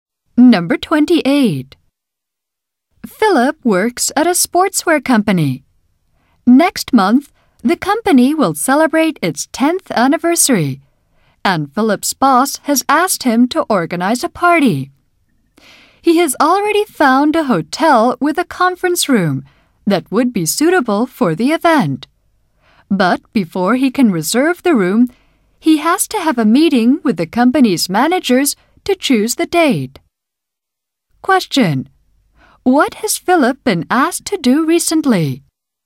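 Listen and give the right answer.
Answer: Organize a party for the company's 10th anniversary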